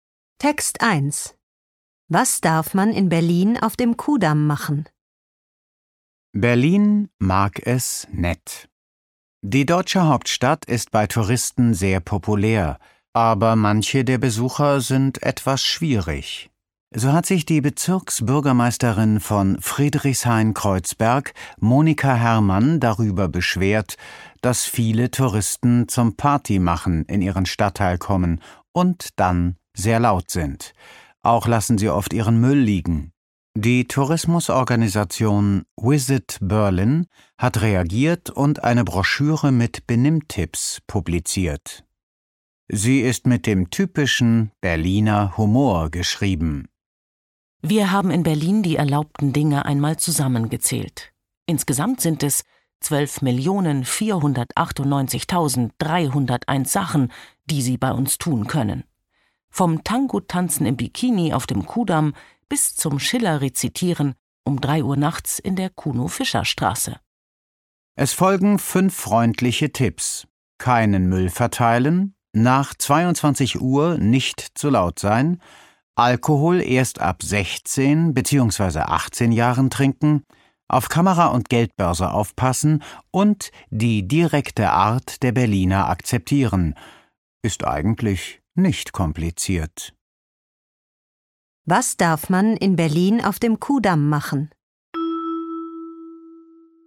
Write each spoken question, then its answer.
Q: Was darf man in Berlin auf dem Kudamm machen?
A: Man darf im Bikini Tango tanzen.